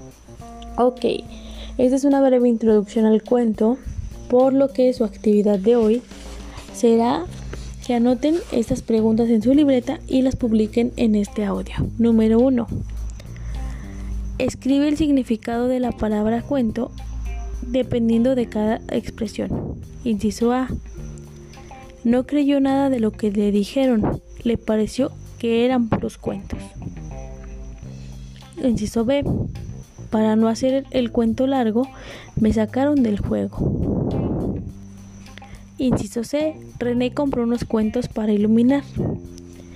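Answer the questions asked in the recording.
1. Mentiras o invenciones
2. La historia o el relato de lo que pasó
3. Libros de cuentos para colorear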